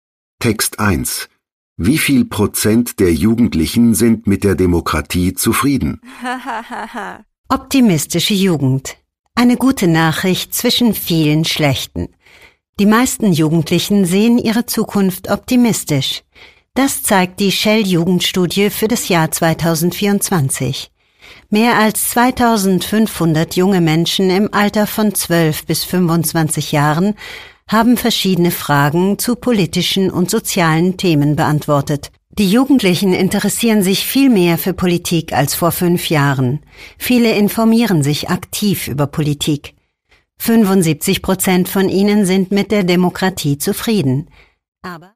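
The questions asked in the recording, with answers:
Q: Wie viel Prozent der Jugendlichen sind mit der Demokratie zufrieden?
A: 75%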